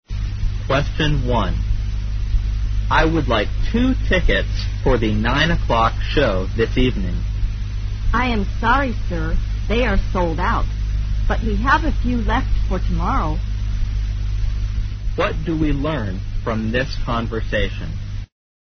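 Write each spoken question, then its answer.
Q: What do we learn from this conversation?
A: The 9 o'clock show this evening is sold out; there are a few tickets left for tomorrow.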